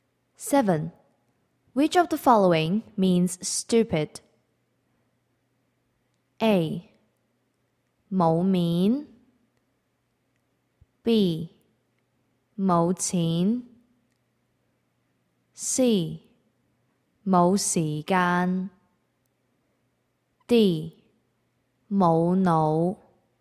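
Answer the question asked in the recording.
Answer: D: 冇脑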